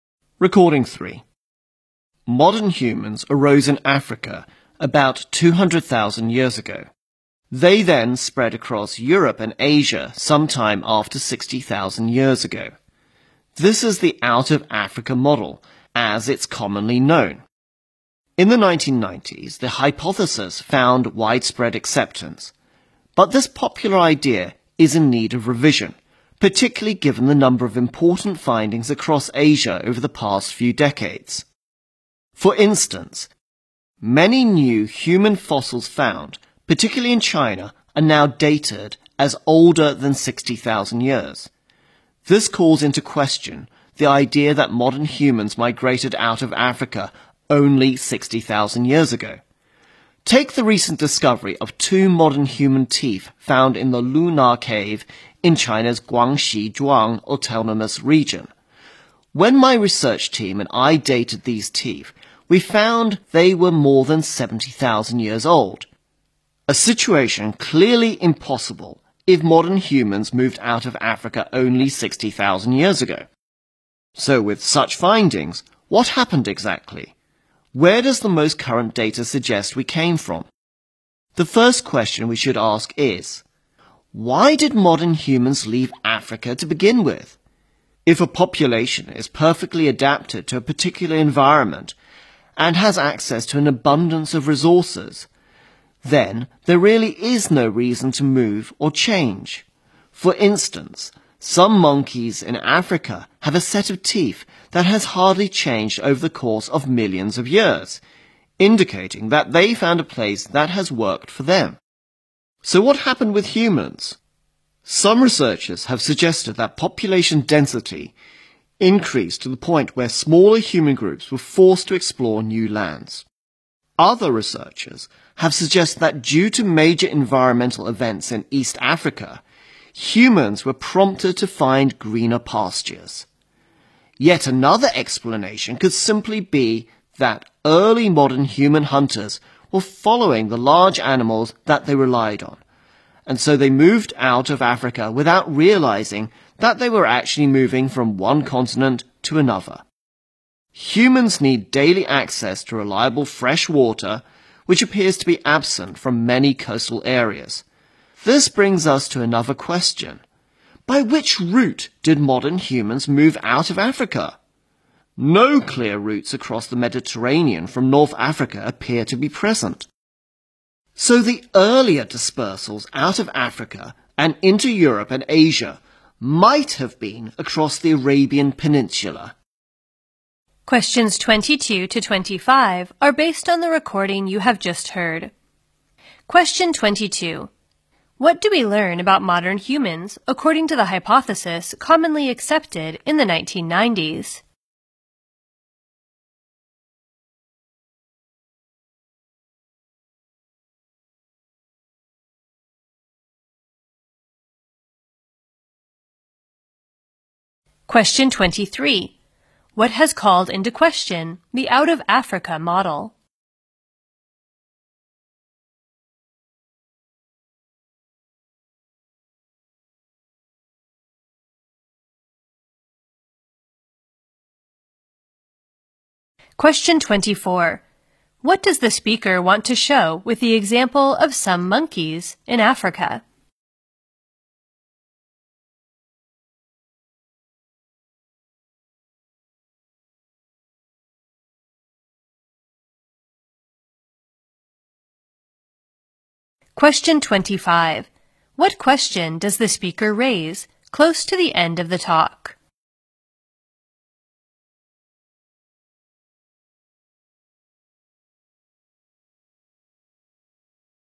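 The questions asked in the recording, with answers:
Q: What do we learn about modern humans according to the hypothesis commonly accepted in the 1990s?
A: They arose in Africa and spread across Europe and Asia after 60,000 years ago.

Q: What has called into question the out-of-Africa model?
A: New human fossils found in Asia, especially China, dated older than 60,000 years.

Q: What does the speaker want to show with the example of some monkeys in Africa?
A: A population well adapted to its environment with abundant resources has no reason to move or change.

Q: What question does the speaker raise close to the end of the talk?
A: By which route did modern humans move out of Africa?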